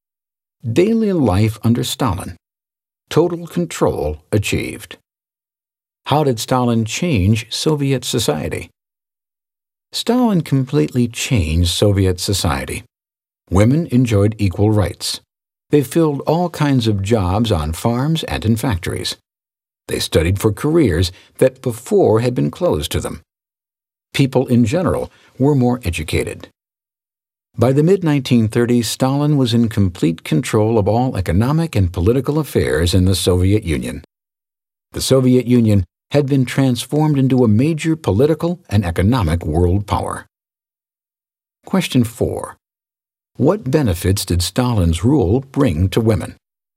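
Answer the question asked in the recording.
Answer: Equal rights, all kinds of jobs, and careers that had been closed to them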